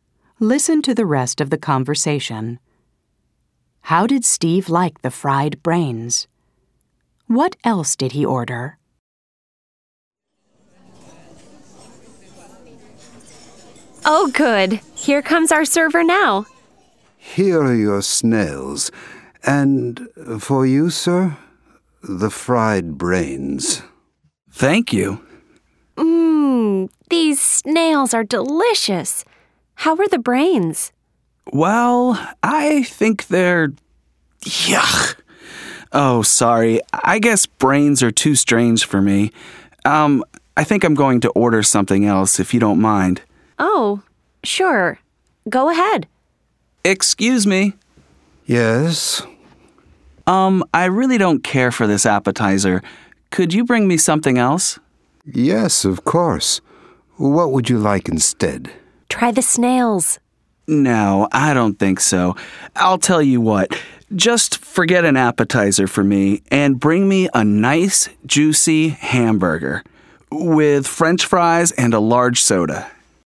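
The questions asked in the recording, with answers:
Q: How did Steve like the fried brains?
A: He didn't like them; they were too strange for him.

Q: What else did he order?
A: A hamburger with French fries and a large soda.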